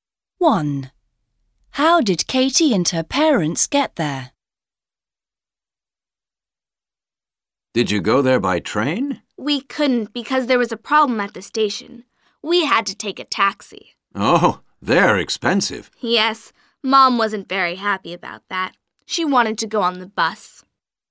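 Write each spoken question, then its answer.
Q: How did Katie and her parents get there?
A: by taxi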